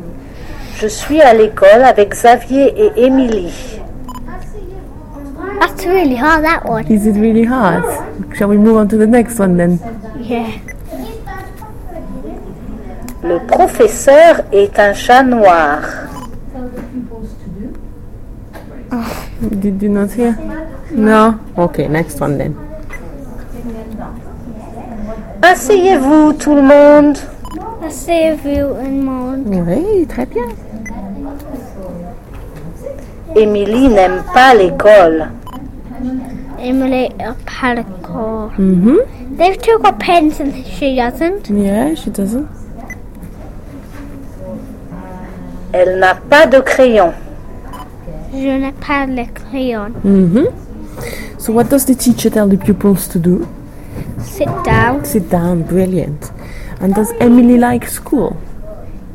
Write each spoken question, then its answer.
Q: And does Emily like school?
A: No, she doesn't.